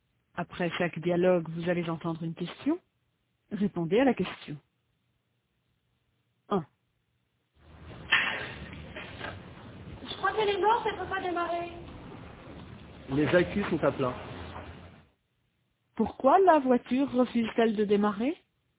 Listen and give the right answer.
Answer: Parce que les accus sont à plat.